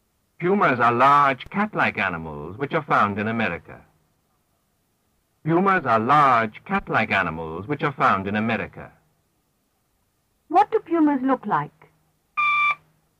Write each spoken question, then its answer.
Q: What do pumas look like?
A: Like cats.